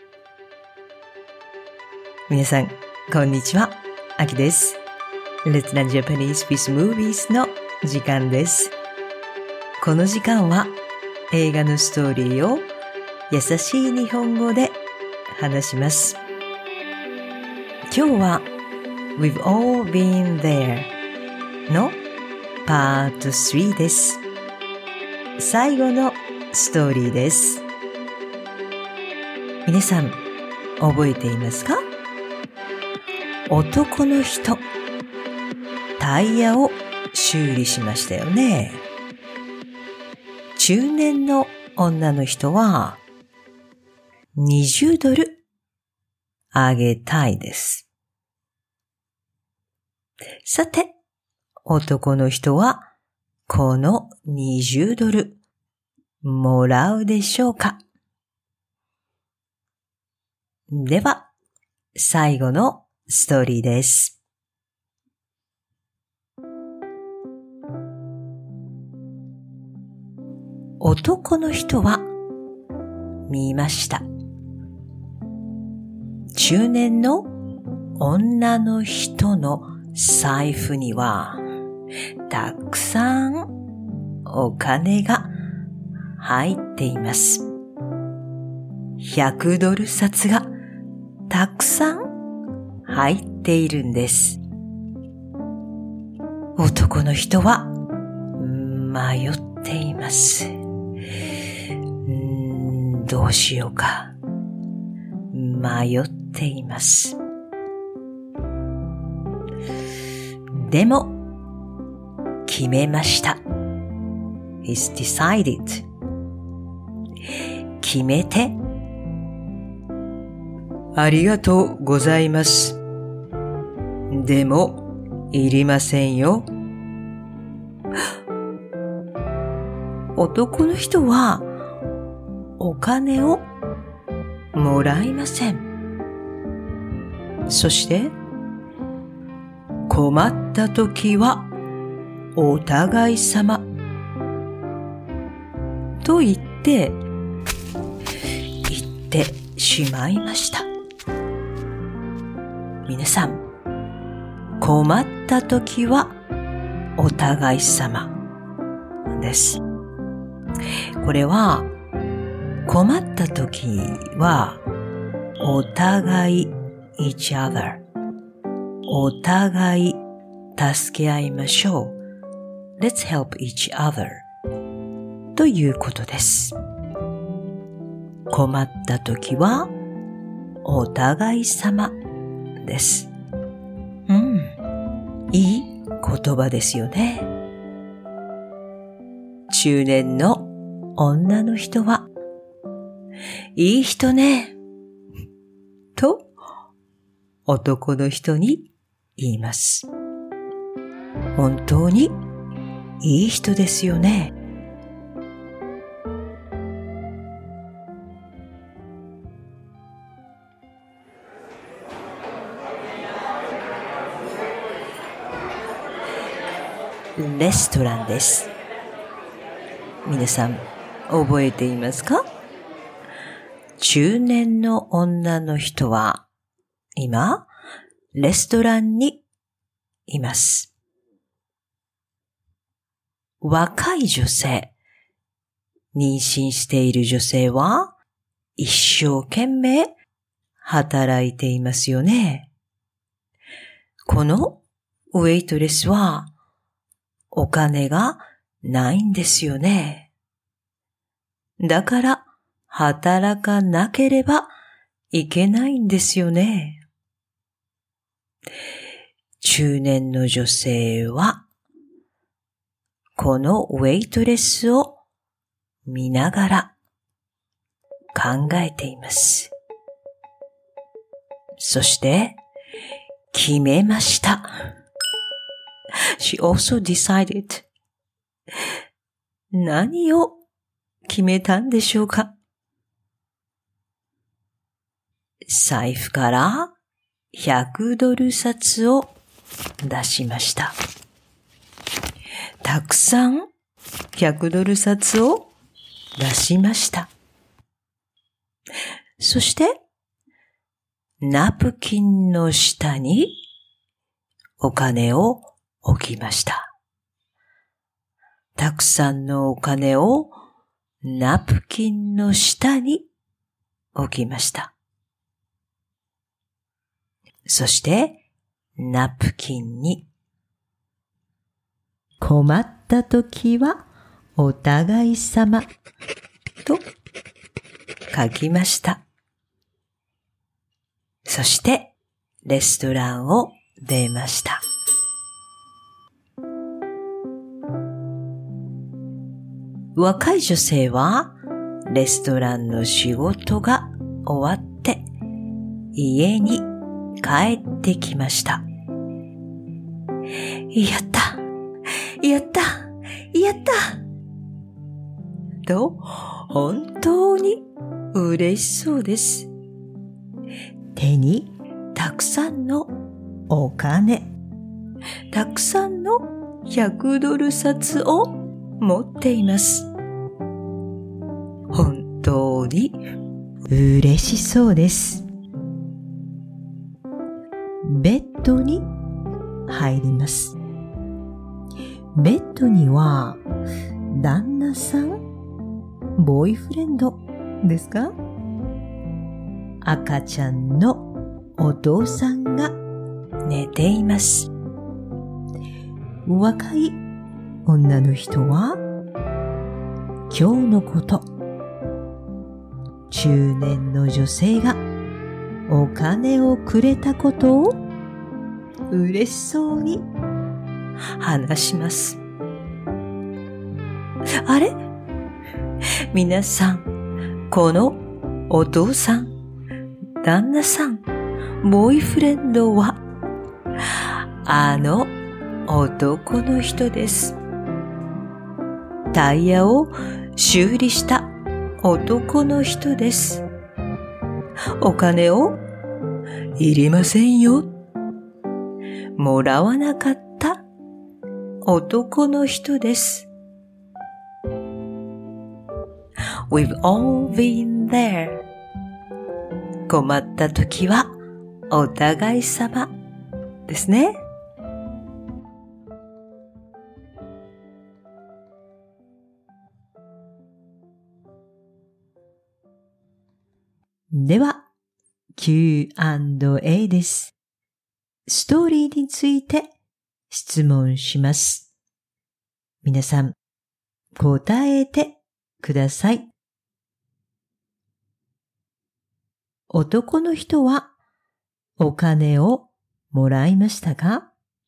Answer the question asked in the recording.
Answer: いいえ、もらいませんでした。